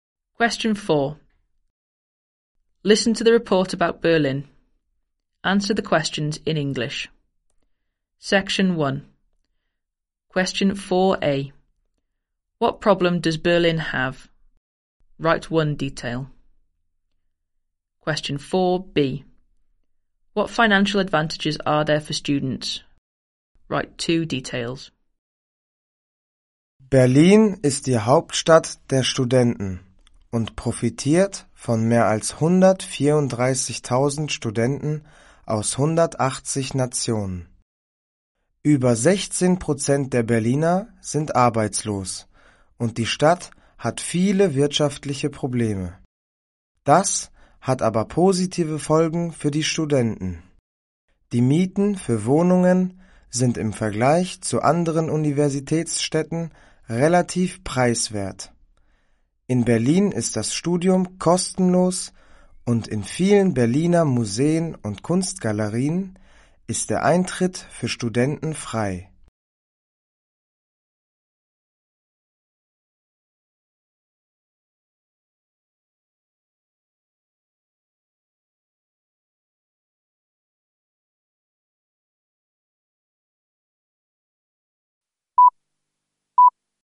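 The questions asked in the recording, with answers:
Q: What problem does Berlin have?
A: Over 16% are unemployed / many economic problems

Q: What financial advantages are there for students?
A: Relatively cheap rent, free studying, free entry to many museums and galleries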